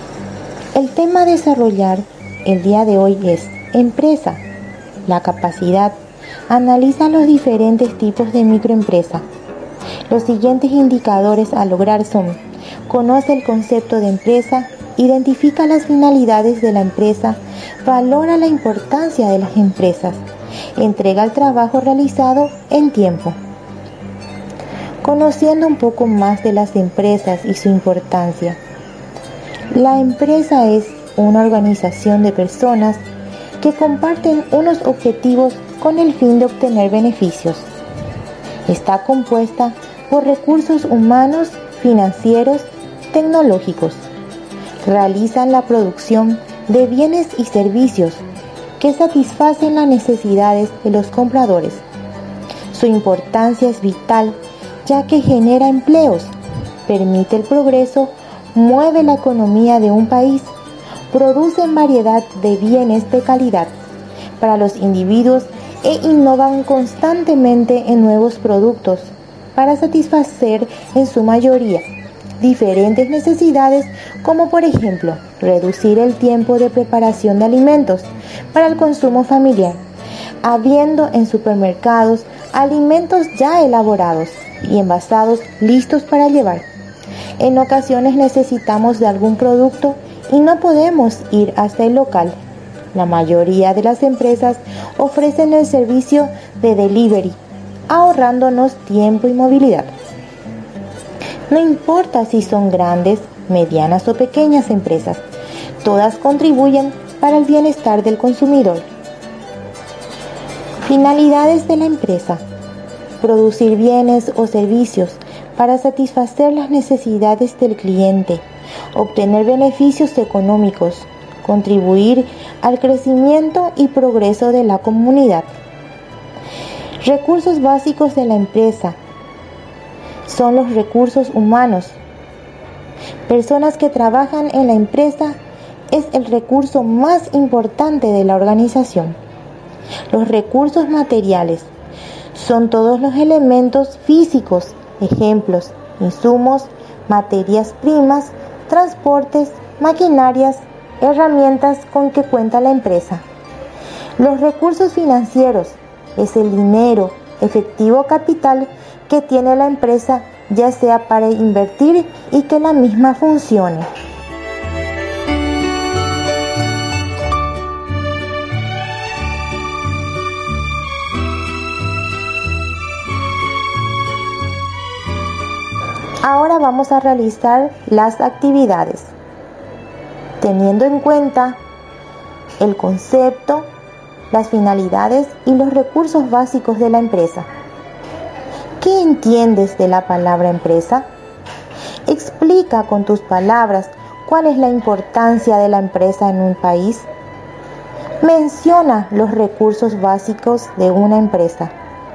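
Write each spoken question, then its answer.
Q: Menciona los recursos básicos de una empresa.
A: Recursos humanos, recursos materiales y recursos financieros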